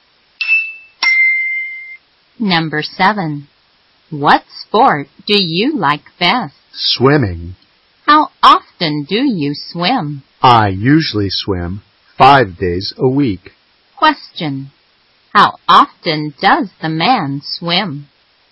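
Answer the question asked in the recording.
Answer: 5 days a week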